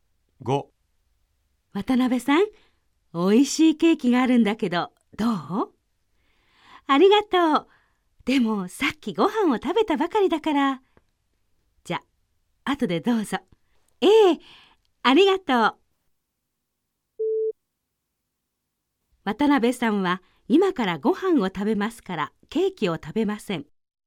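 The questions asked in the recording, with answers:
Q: 渡辺さんは今からご飯を食べますからケーキを食べません。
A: ×(さっきご飯を食べたばかり)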